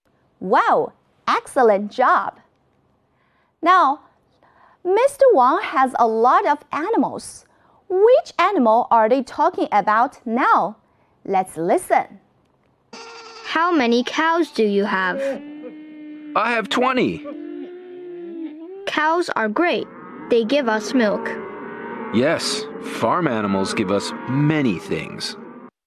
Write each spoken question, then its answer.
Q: Which animal are they talking about now?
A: They are talking about cows.